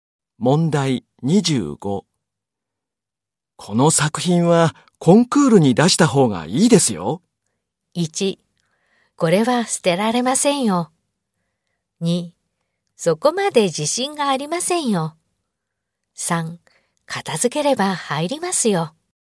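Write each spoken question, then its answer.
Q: この作品はコンクールに出した方がいいですよ。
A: 1: そこまで自信がありませんよ。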